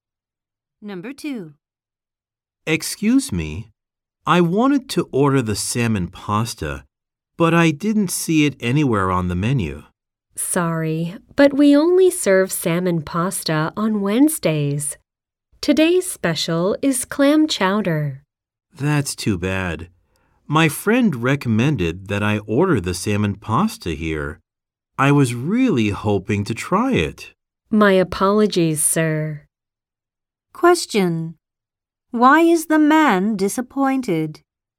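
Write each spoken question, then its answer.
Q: Why is the man disappointed?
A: The salmon pasta is only served on Wednesdays.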